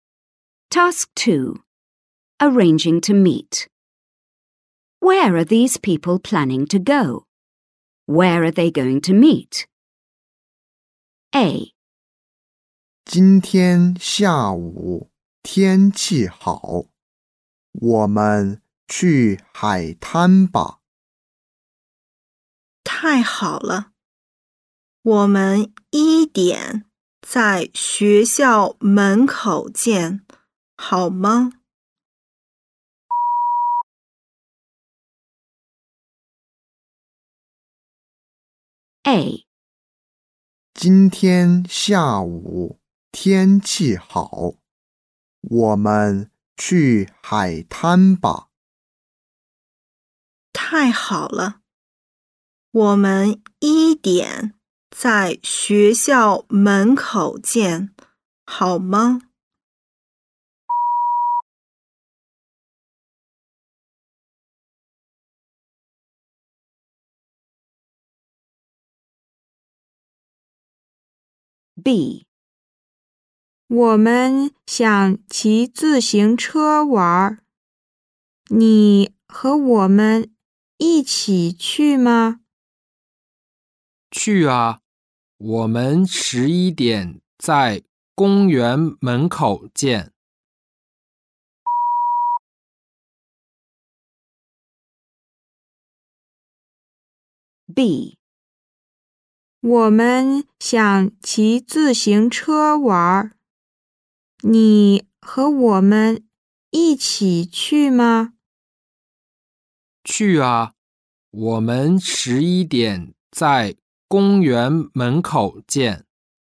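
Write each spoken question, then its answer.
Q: Where are these people planning to go?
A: To the beach

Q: Where are they going to meet?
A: At the school gate at one o'clock

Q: Where are these people planning to go?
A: Cycling (riding bikes)

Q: Where are they going to meet?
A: At the park gate at 11 o'clock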